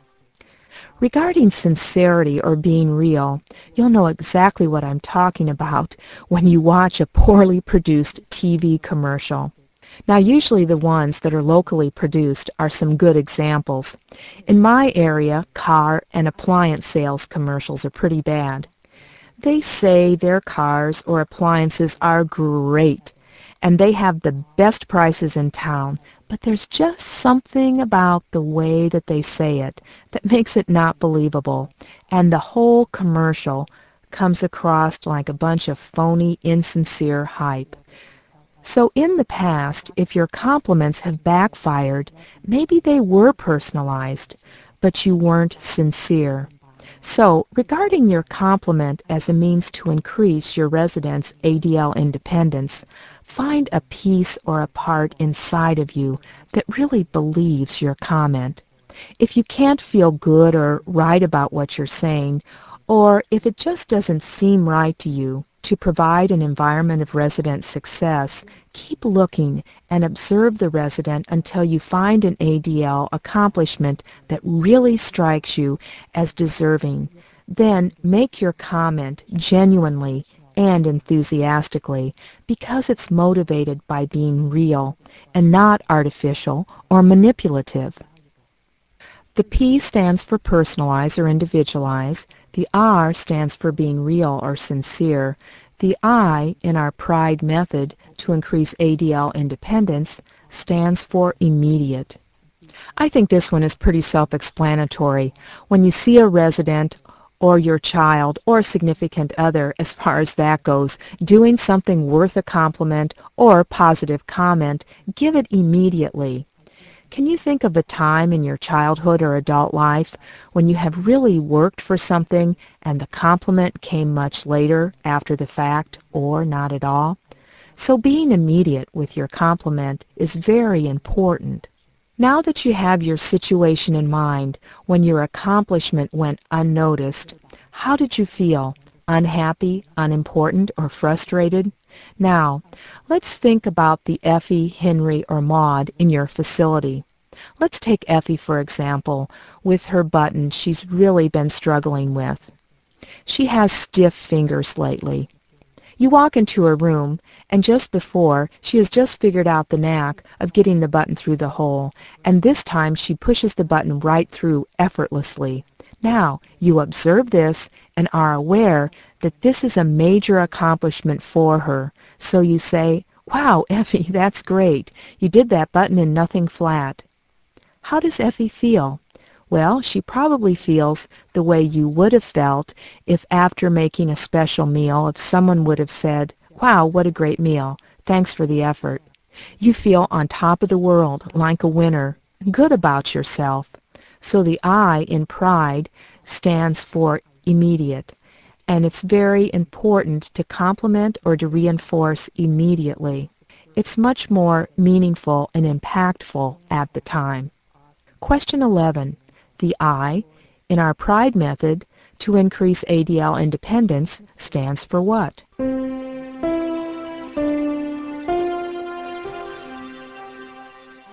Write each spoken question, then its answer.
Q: The I, in our PRIDE method, to increase ADL independence, stands for what?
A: I is for immediate.